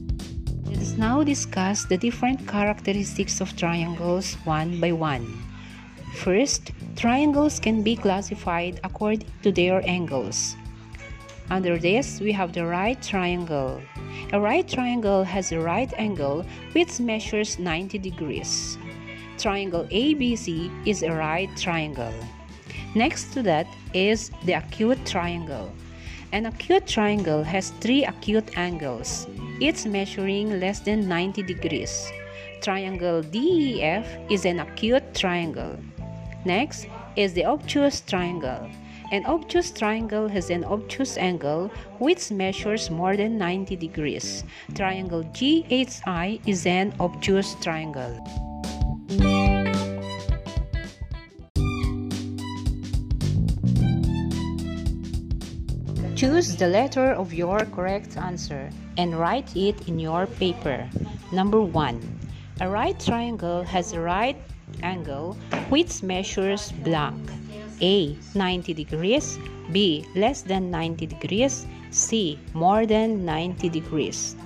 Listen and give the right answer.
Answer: The correct answer is letter A, 90 degrees.